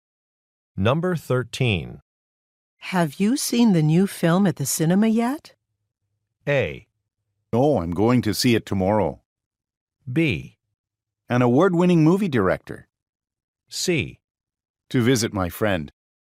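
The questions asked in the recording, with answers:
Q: Have you seen the new film at the cinema yet?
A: A: No, I'm going to see it tomorrow.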